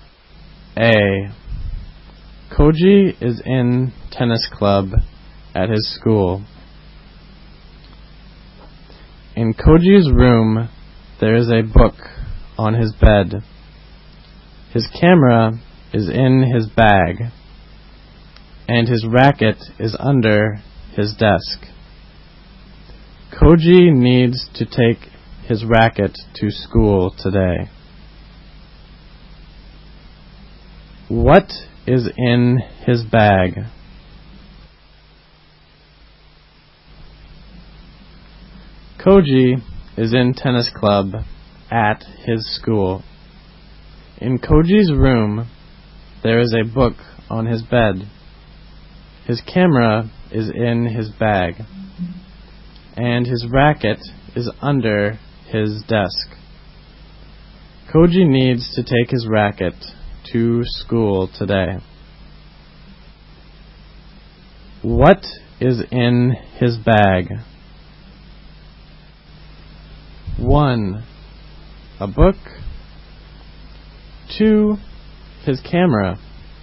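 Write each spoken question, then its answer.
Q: What is in his bag?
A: 2: His camera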